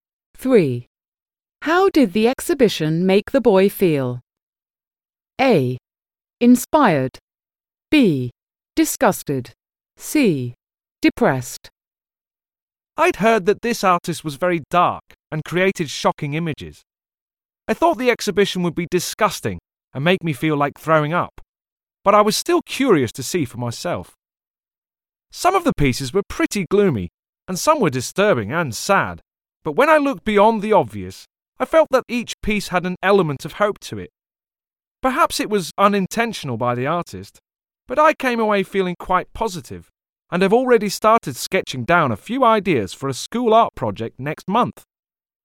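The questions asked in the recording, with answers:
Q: How did the exhibition make the boy feel?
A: A: Inspired.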